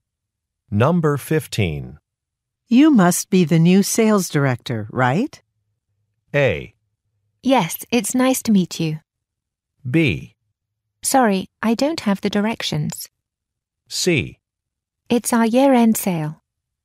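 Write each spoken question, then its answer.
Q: You must be the new sales director, right?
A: A: Yes, it's nice to meet you.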